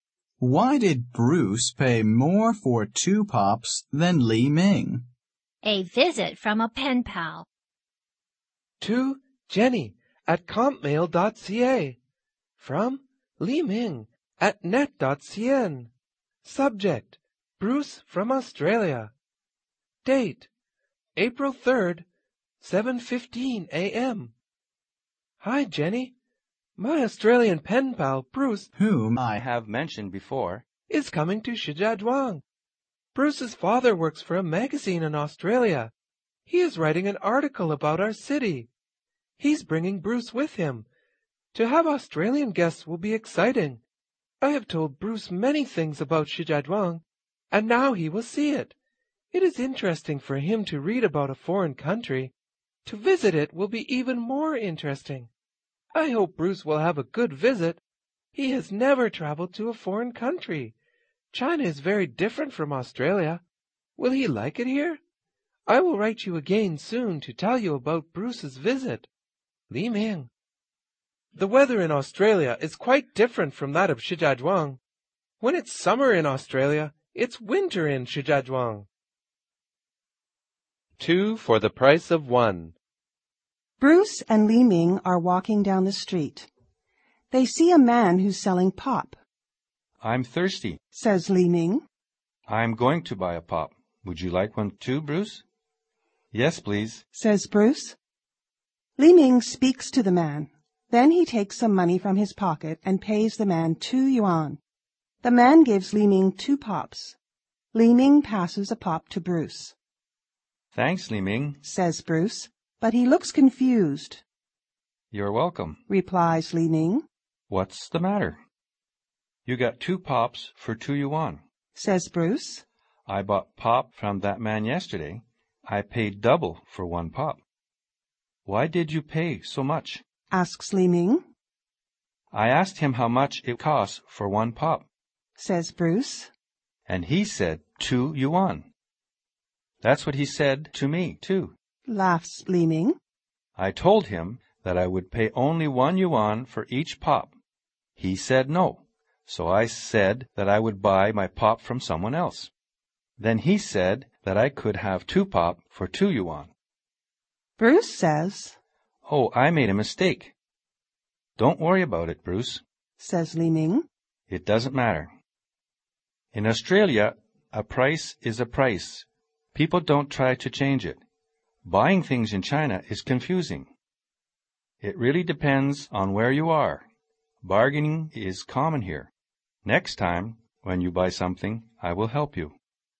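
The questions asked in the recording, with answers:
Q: Why did Bruce pay more for two pops than Li Ming?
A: Li Ming bargained and Bruce didn't; Bruce just paid the price the man asked (2 yuan for one pop).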